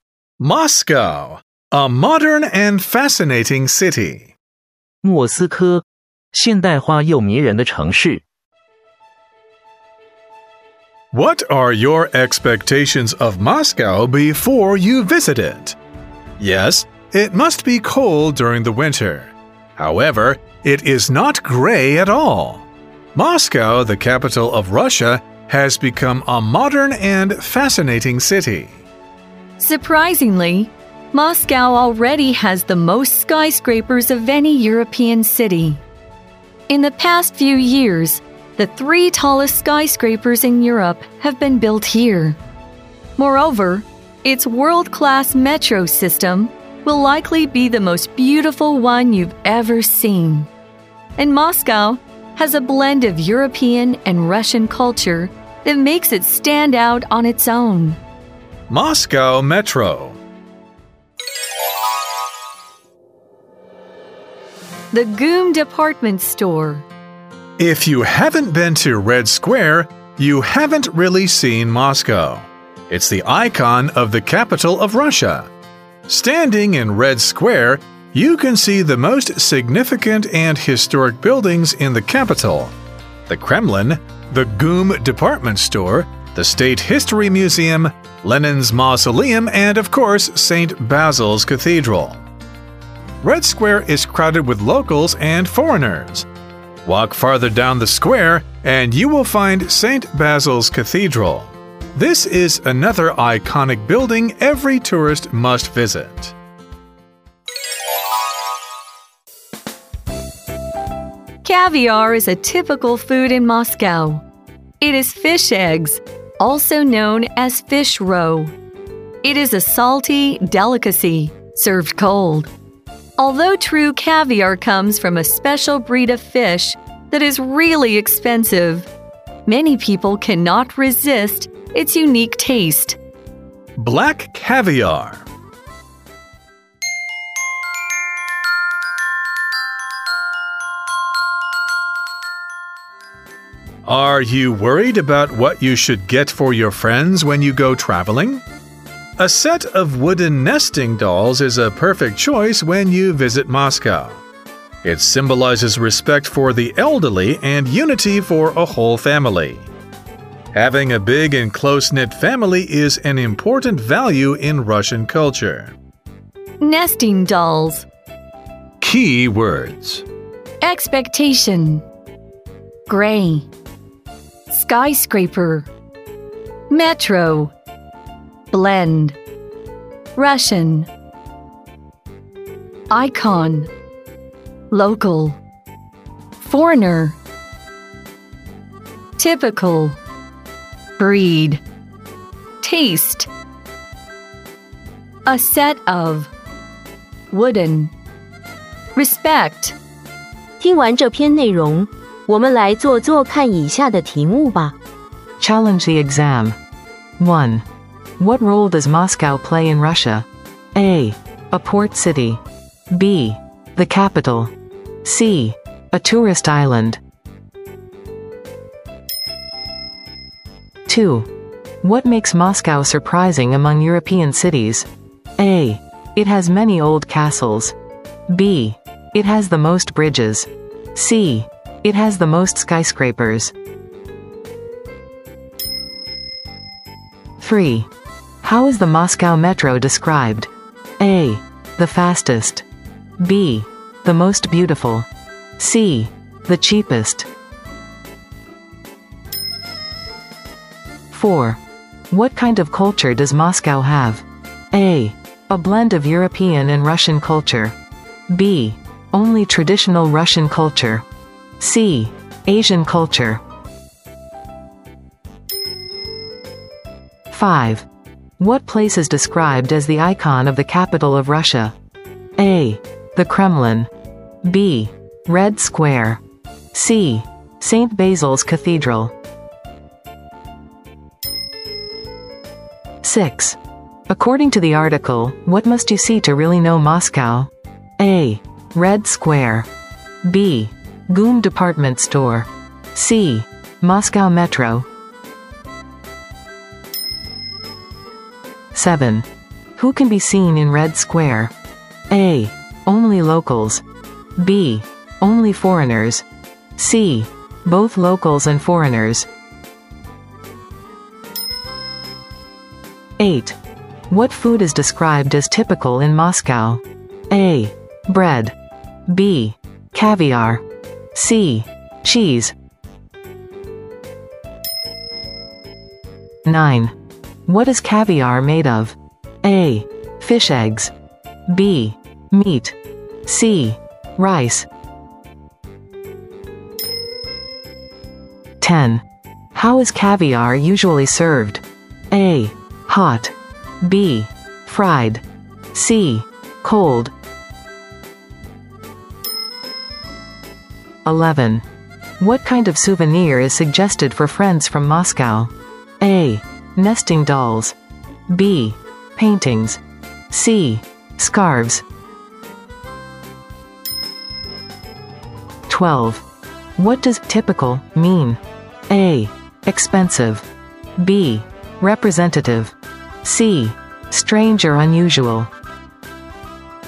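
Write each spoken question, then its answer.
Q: What role does Moscow play in Russia?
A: B: The capital.

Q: What makes Moscow surprising among European cities?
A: C: It has the most skyscrapers.

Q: How is the Moscow metro described?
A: B: The most beautiful.

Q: What kind of culture does Moscow have?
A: A: A blend of European and Russian culture.

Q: What place is described as the icon of the capital of Russia?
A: B: Red Square.

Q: According to the article, what must you see to really know Moscow?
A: A: Red Square.

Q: Who can be seen in Red Square?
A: C: Both locals and foreigners.

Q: What food is described as typical in Moscow?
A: B: Caviar.

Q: What is caviar made of?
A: A: Fish eggs.

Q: How is caviar usually served?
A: C: Cold.

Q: What kind of souvenir is suggested for friends from Moscow?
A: A: Nesting dolls.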